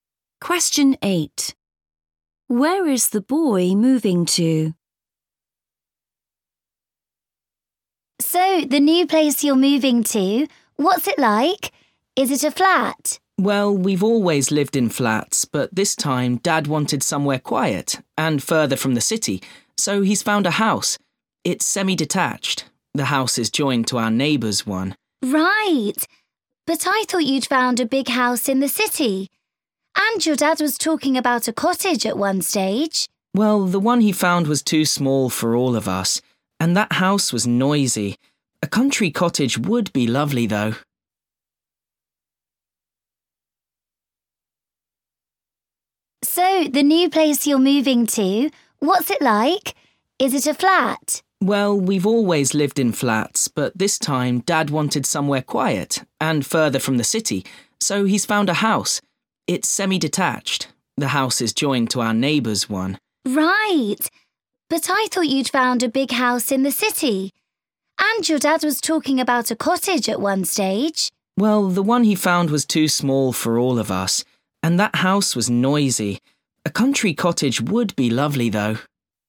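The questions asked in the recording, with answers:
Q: Where is the boy moving to?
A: a semi-detached house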